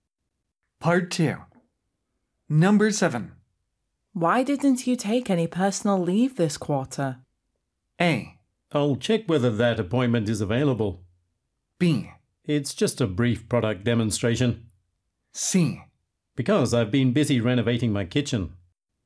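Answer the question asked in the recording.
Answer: C: Because I've been busy renovating my kitchen.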